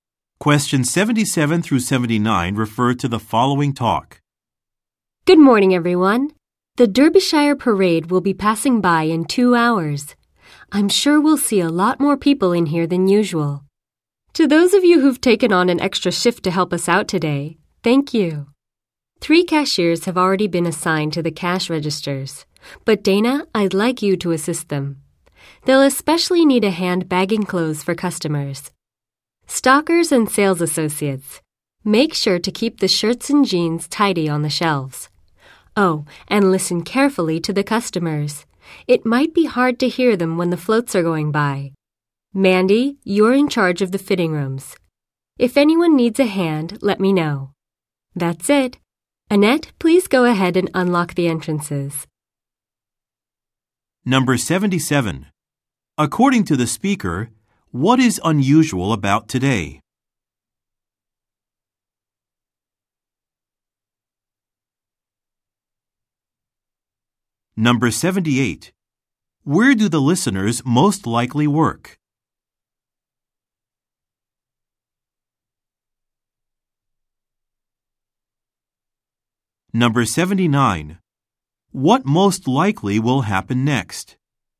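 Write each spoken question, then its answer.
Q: According to the speaker, what is unusual about today?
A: A parade is passing by, so more customers are expected

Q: Where do the listeners most likely work?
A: At a clothing store

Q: What most likely will happen next?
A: The store will open (entrances unlocked)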